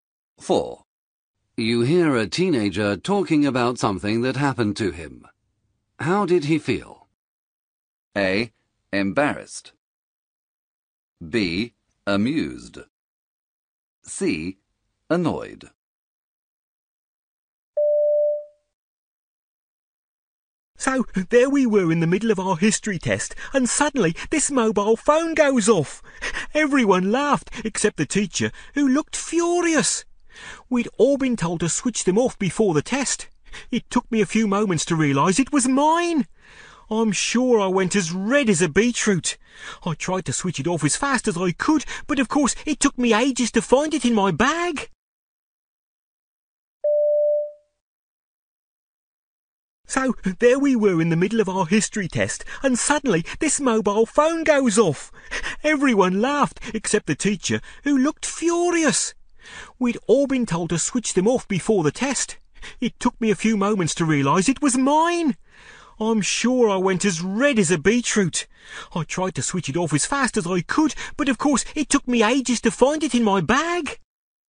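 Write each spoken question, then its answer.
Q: How did he feel?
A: A: Embarrassed.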